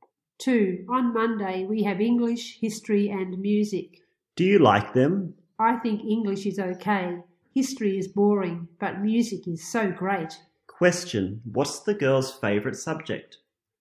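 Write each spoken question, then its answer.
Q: Question, what's the girl's favorite subject?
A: Music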